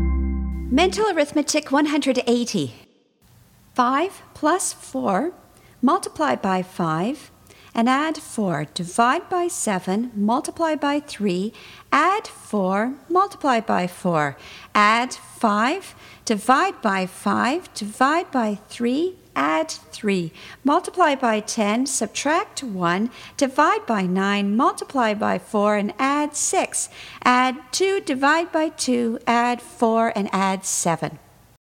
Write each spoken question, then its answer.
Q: 5 plus 4, multiply by 5, and add 4. Divide by 7, multiply by 3, add 4, multiply by 4. Add 5, divide by 5, divide by 3, add 3. Multiply by 10, subtract 1, divide by 9, multiply by 4, and add 6. Add 2, divide by 2, add 4, and add 7.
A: And the answer is 37.